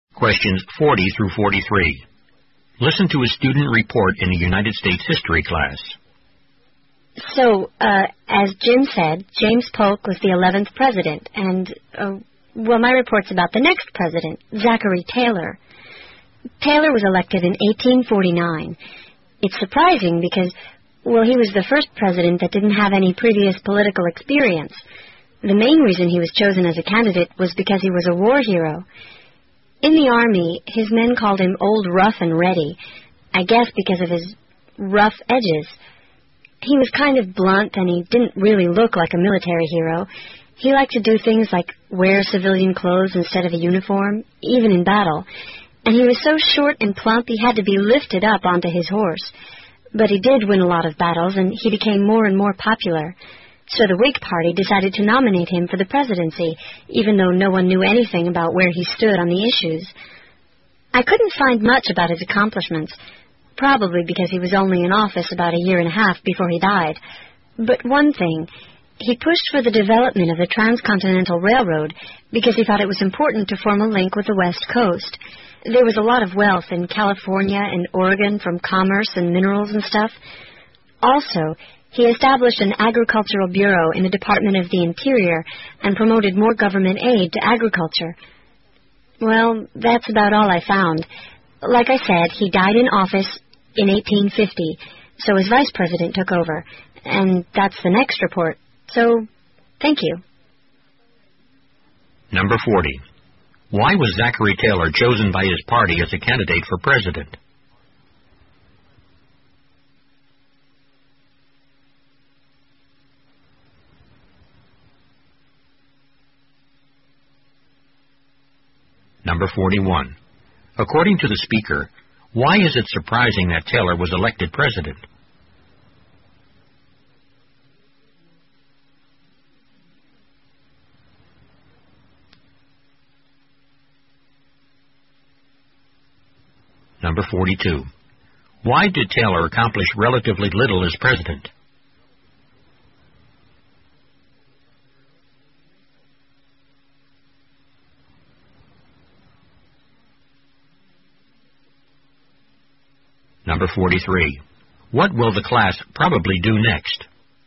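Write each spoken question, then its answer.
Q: Why was Zachary Taylor chosen by his party as a candidate for president?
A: He was a war hero.

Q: According to the speaker, why is it surprising that Taylor was elected president?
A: He had no previous political experience.

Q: Why did Taylor accomplish relatively little as president?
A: He was only in office about a year and a half before he died.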